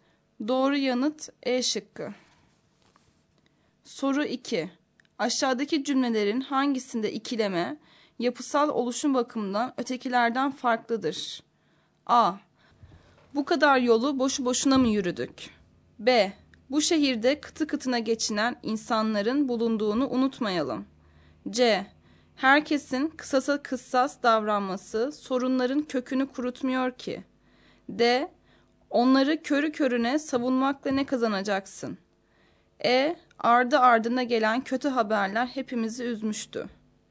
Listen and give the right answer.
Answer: Doğru yanıt C şıkkı.